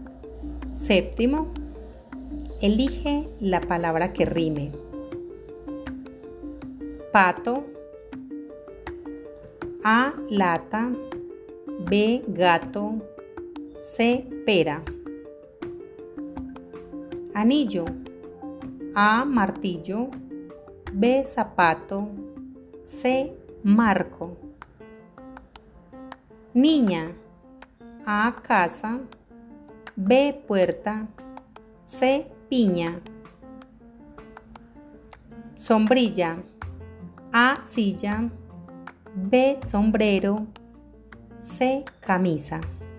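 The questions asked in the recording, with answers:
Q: Pato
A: B: Gato

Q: Anillo.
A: A: Martillo

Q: Niña.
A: C: Piña

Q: Sombrilla.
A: A: Silla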